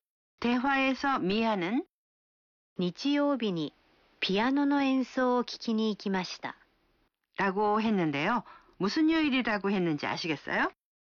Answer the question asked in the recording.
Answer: 일요일이요.